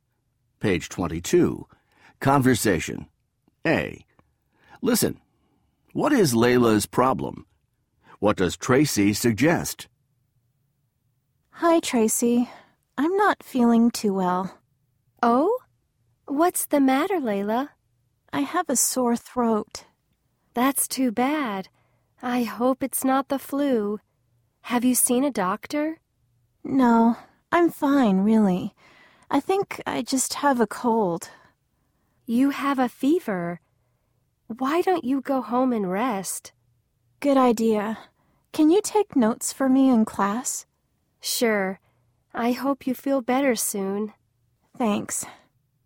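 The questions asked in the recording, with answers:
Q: What is Layla's problem?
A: She has a sore throat (and a fever).

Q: What does Tracy suggest?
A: She suggests Layla go home and rest.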